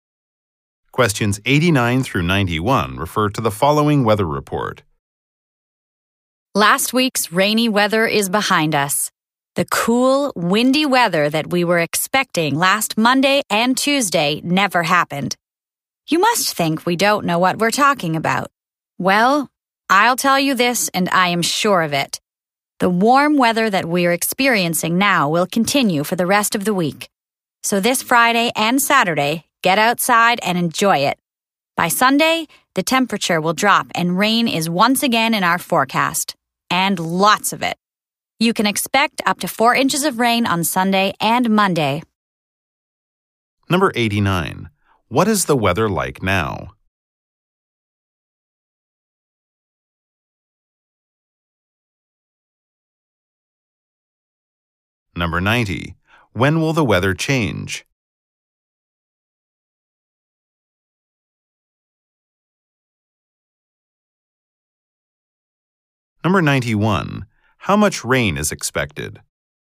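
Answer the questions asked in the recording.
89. Warm
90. On Sunday
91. Up to 4 inches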